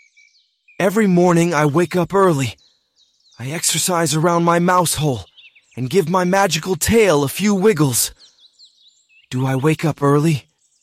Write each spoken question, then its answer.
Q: Do I wake up early?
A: Yes, I do. I wake up early every morning.